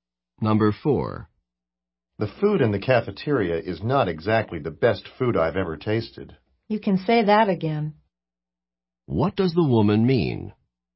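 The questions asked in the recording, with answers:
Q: What does the woman mean?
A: She agrees that the cafeteria food is not very good.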